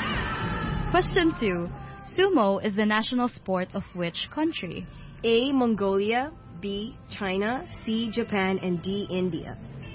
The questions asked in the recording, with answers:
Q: Sumo is the national sport of which country?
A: Yes, Japan.